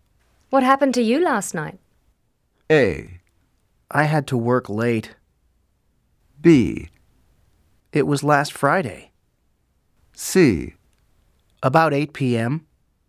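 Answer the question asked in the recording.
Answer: A: I had to work late.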